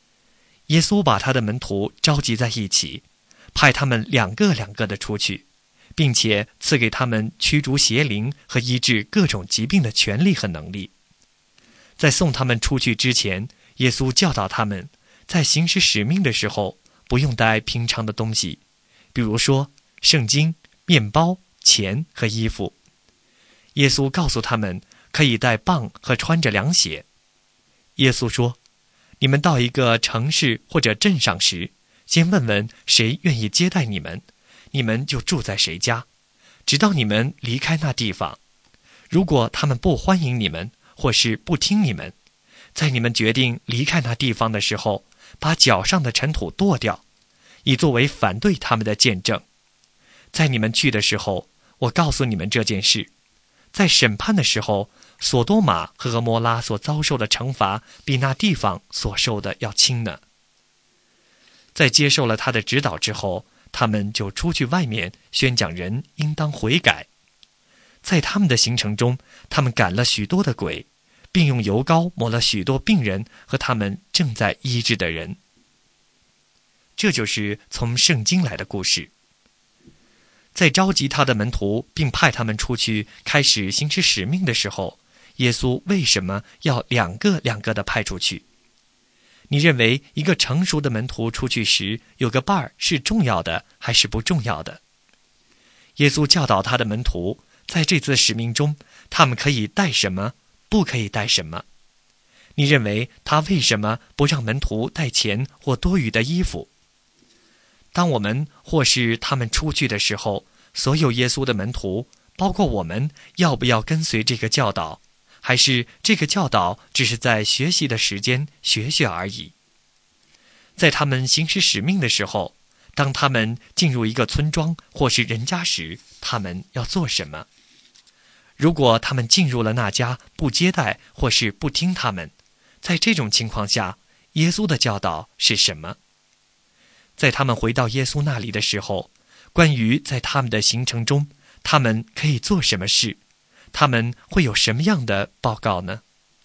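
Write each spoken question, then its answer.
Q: 在他们行使使命的时候,当他们进入一个村庄或是人家时,他们要做什么?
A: 先问谁愿意接待他们,就住在谁家,直到离开那地方

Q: 如果他们进入了那家不接待或是不听他们,在这种情况下,耶稣的教导是什么?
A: 离开时把脚上的尘土跺掉,作为反对他们的见证

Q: 在他们回到耶稣那里的时候,关于在他们的行程中,他们可以做什么事?他们会有什么样的报告呢?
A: 宣讲人应当悔改,赶了许多鬼,用油抹了许多病人,医治他们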